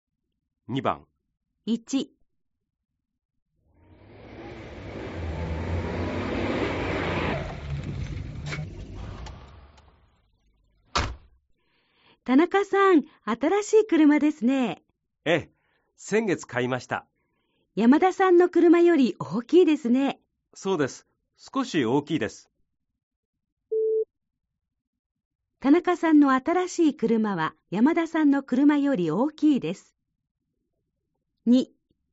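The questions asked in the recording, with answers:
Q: 田中さんの新しい車は山田さんの車より大きいです。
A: ○(正しい)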